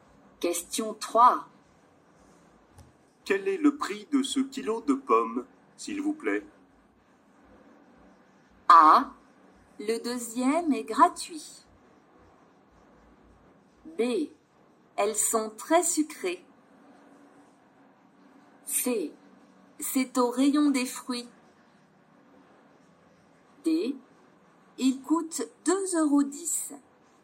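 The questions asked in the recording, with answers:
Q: Quel est le prix de ce kilo de pommes, s'il vous plaît?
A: D: Il coûte 2,10 euros.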